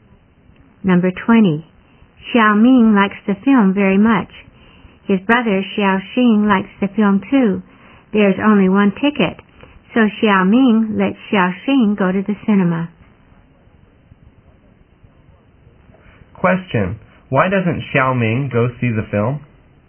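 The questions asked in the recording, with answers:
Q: Why doesn't Xiao Ming go see the film?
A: There's only one ticket, so he lets his brother go.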